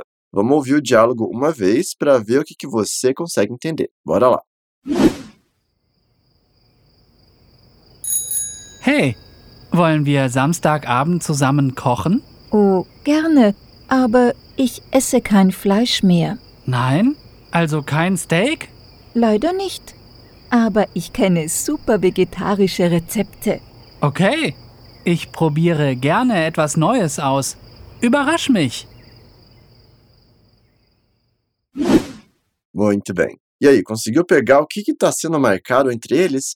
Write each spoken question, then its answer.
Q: E aí, conseguiu pegar o que está sendo marcado entre eles?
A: Hey, vamos cozinhar juntos sábado à noite?